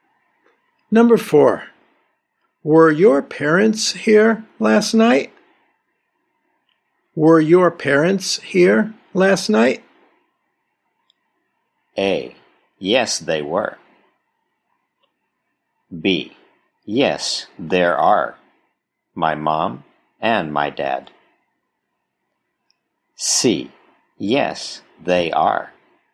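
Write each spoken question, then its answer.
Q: Were your parents here last night?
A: A: Yes, they were.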